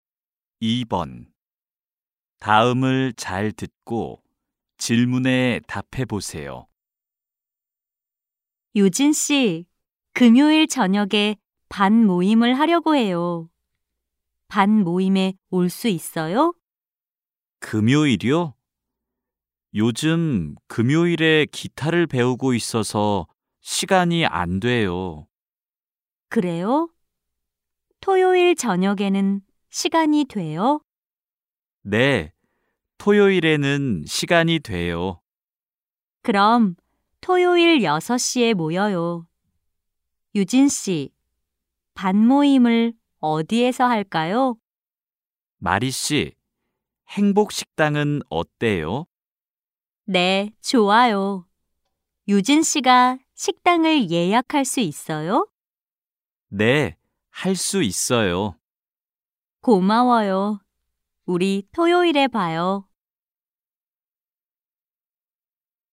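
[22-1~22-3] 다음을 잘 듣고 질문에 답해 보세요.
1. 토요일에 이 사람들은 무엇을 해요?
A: 반 모임

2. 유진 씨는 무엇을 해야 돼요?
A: 식당을 예약해야 돼요

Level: 1B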